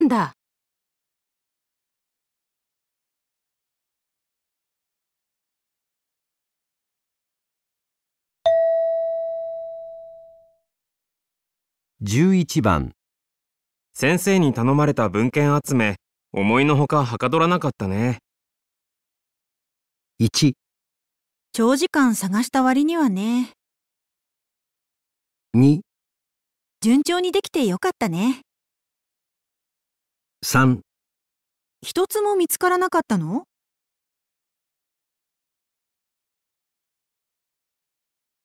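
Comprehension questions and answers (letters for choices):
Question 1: 先生に頼まれた文献集め、思いの外、はかどらなかったね。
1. 長時間探した割にはね。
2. 順調にできてよかったね。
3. 一つも見つからなかったの?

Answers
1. 1

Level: 【N1 第1回】聴解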